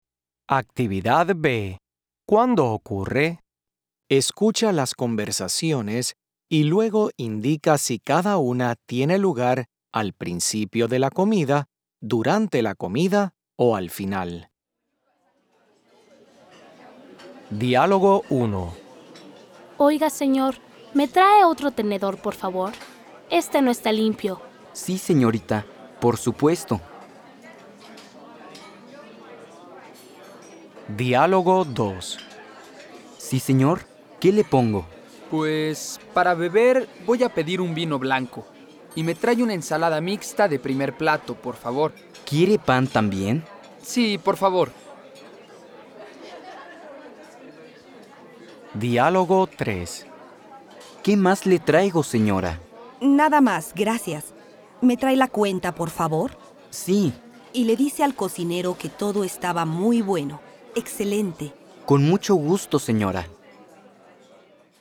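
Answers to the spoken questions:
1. durante la comida
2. al principio de la comida
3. al final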